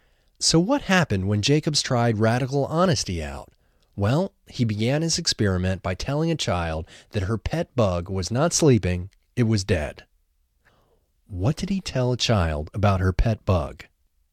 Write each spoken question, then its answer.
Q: What did he tell a child about her pet bug?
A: He told a child that her pet bug was not sleeping, it was dead.